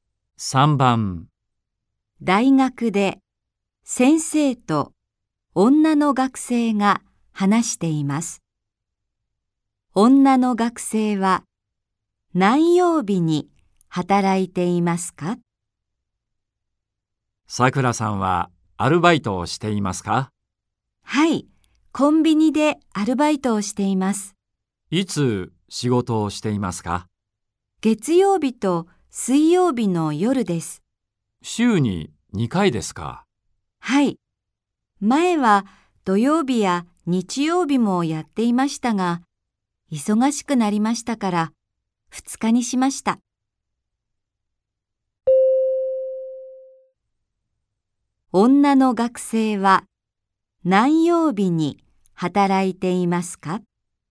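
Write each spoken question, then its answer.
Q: 女の学生は何曜日に働いていますか?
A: 月曜日と水曜日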